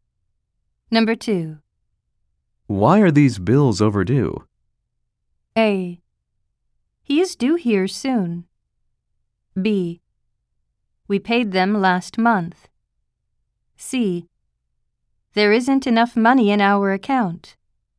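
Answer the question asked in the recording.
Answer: C: There isn't enough money in our account.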